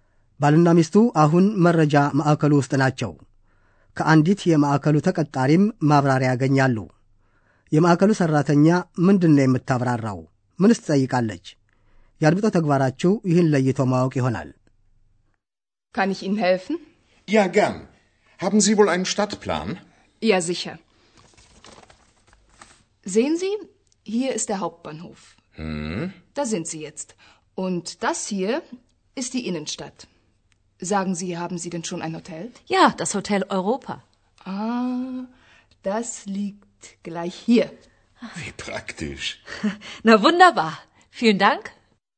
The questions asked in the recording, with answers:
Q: የማዕከሉ ሠራተኛ ምንድን ነው የምታብራራው?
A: ሴትየዋ ካርታውን እያመለከተች ባልና ሚስቱ የት እንደሚገኙ ታስረዳለች።

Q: ምንስ ትጠይቃለች?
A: ሆቴል ይዘውም እንደሆነ ትጠይቃለች።